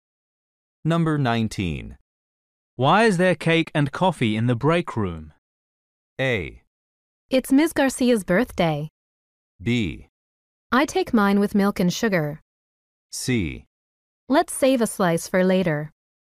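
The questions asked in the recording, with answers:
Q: Why is there cake and coffee in the break room?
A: A: It's Ms. Garcia's birthday.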